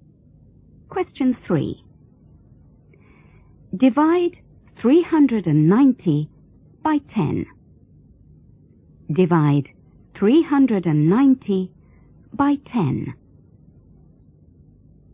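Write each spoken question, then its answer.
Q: Divide 390 by 10.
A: 39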